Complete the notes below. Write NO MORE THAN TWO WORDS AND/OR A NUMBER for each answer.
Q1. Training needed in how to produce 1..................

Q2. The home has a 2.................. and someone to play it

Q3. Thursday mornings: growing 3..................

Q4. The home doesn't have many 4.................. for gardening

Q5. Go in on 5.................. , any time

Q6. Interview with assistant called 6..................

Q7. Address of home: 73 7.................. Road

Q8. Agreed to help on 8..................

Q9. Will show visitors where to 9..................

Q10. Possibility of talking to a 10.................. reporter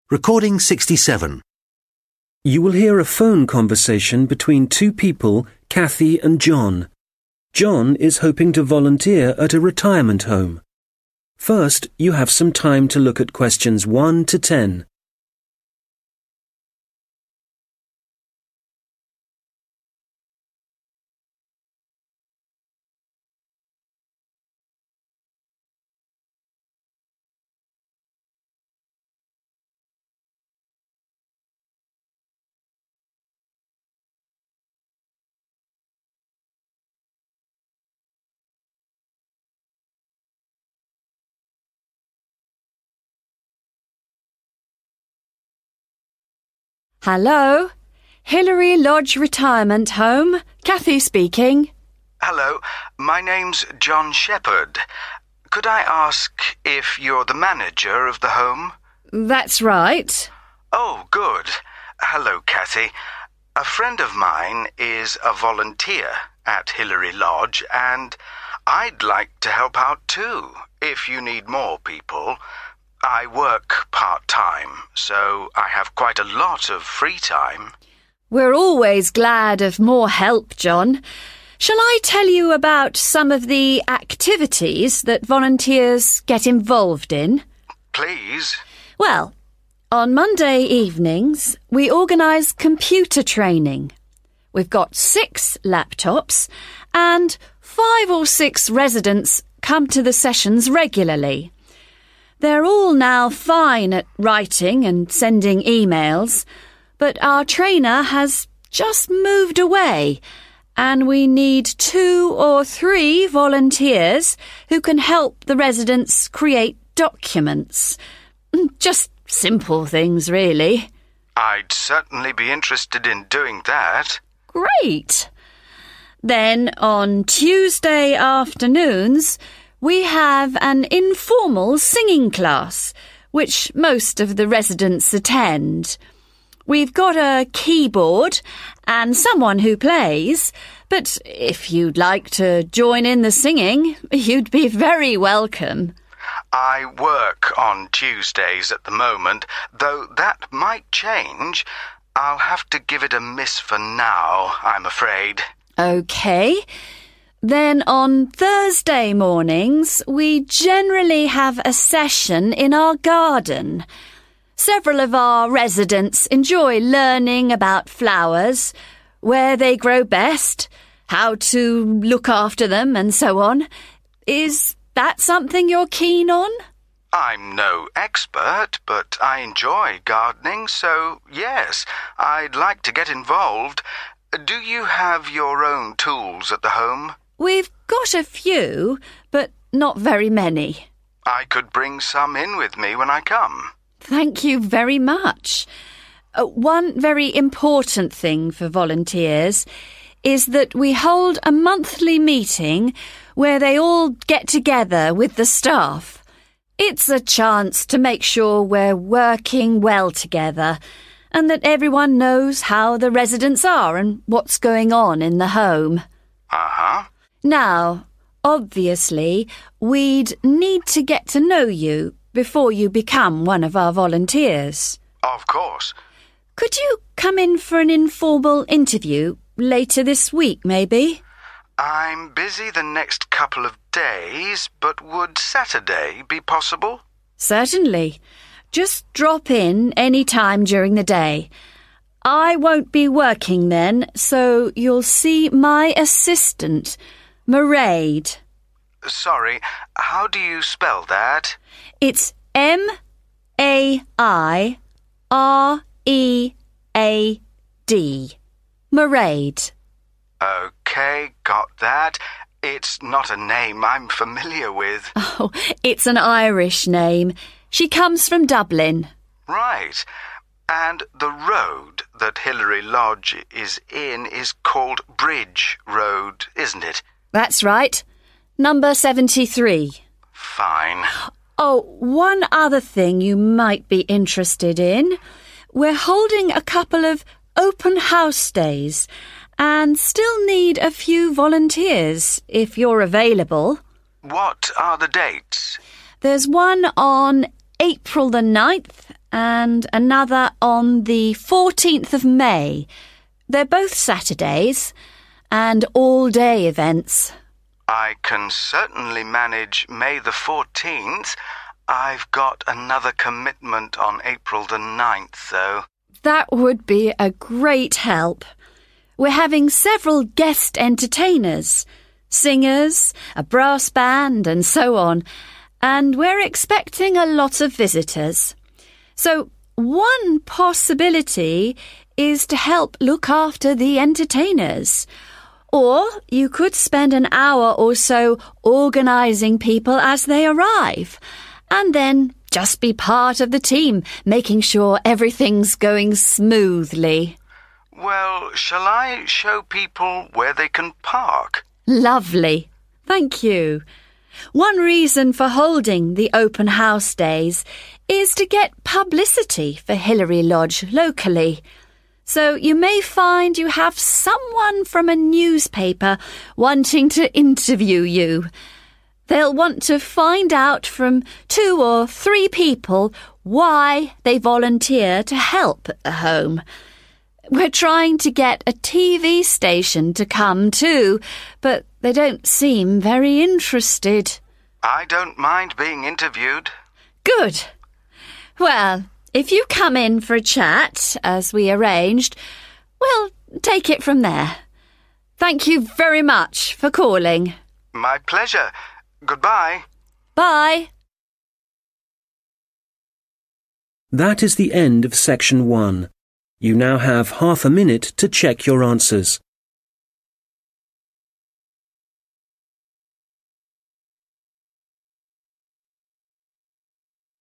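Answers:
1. documents
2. keyboard
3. flowers
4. tools
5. Saturday
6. Mairead
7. Bridge
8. 14 May
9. park
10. newspaper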